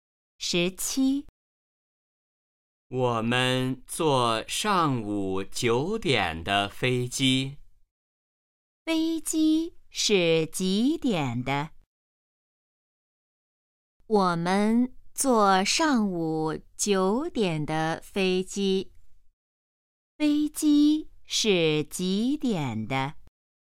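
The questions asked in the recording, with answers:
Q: 飞机是几点的?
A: 上午九点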